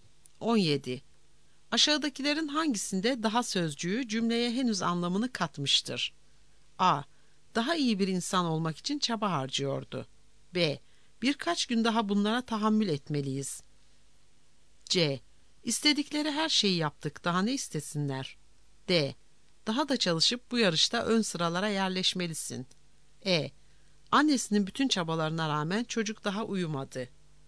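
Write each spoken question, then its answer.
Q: Aşağıdakilerin hangisinde daha sözcüğü cümleye henüz anlamını katmıştır?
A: E: Annesinin bütün çabalarına rağmen çocuk daha uyumadı.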